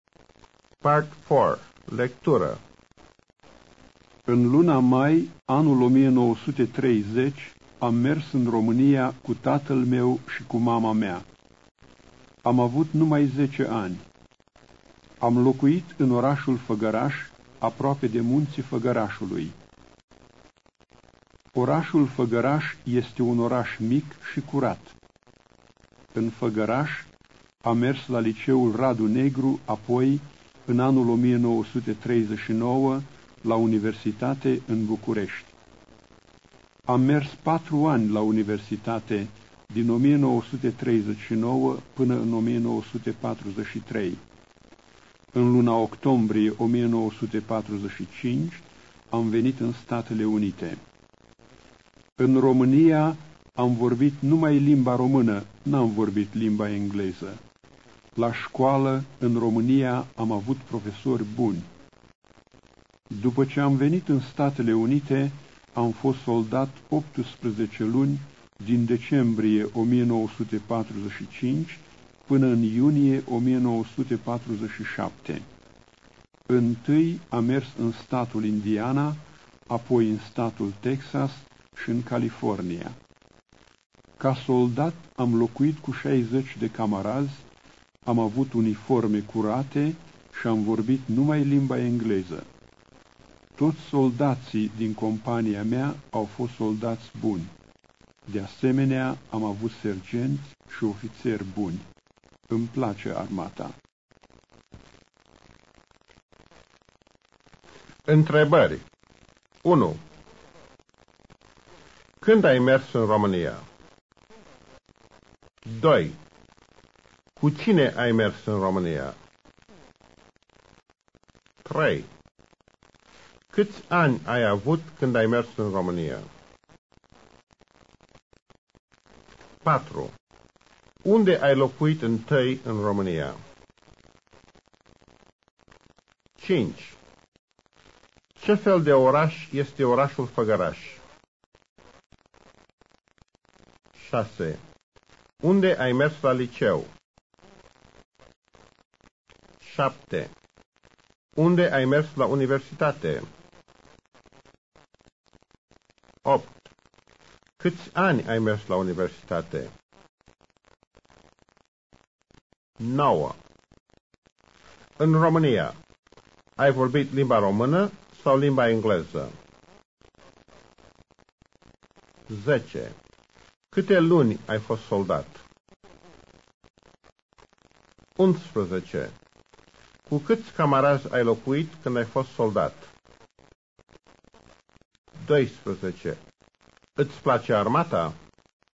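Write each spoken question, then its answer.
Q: Când ai mers în România?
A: În luna mai, anul 1930

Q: Cu cine ai mers în România?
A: Cu tatăl meu și cu mama mea

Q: Câți ani ai avut când ai mers în România?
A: Numai 10 ani

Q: Unde ai locuit întâi în România?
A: În orașul Făgăraș

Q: Ce fel de oraș este orașul Făgăraș?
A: Un oraș mic și curat

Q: Unde ai mers la liceu?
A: La liceul Radu Negru din Făgăraș

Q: Unde ai mers la universitate?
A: În București

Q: Câți ani ai mers la universitate?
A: 4 ani

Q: În România, ai vorbit limba română sau limba engleză?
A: Numai limba română

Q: Câte luni ai fost soldat?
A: 18 luni

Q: Cu câți camarazi ai locuit când ai fost soldat?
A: Cu 60 de camarazi

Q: Îți place armata?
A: Da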